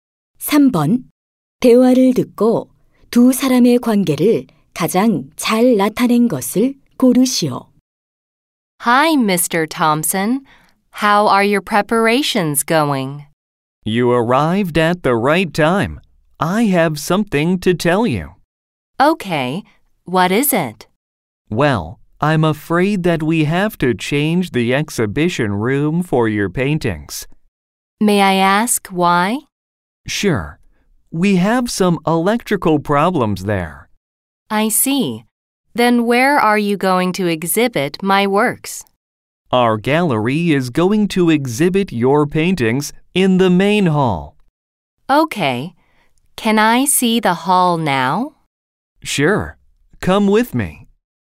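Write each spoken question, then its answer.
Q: 대화를 듣고 두 사람의 관계를 가장 잘 나타낸 것을 고르시오.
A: 화가와 미술관 직원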